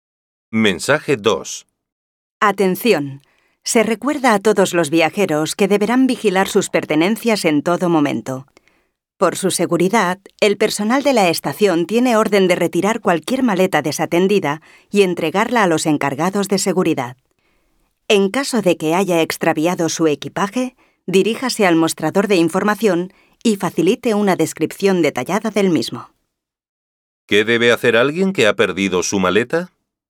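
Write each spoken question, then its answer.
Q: ¿Qué debe hacer alguien que ha perdido su maleta?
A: Ir al mostrador de información y dar una descripción detallada de la maleta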